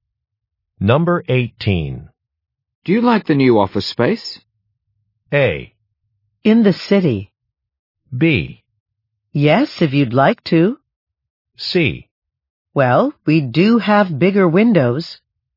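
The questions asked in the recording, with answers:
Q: Do you like the new office space?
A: C: Well, we do have bigger windows.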